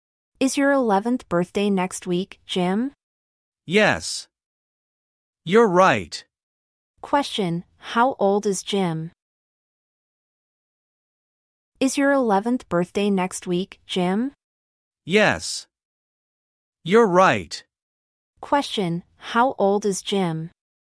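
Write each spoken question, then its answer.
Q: how old is Jim?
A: 10 years old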